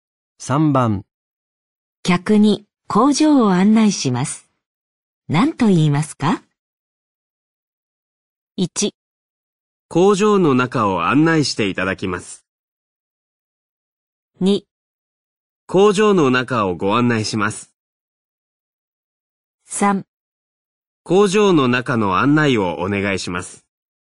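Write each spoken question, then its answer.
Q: 客に工場を案内します。何と言いますか?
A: 2: 工場の中をご案内します。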